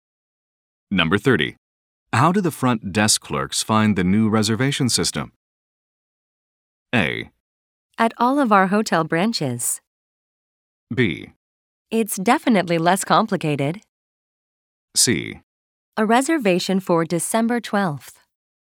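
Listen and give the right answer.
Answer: B: It's definitely less complicated.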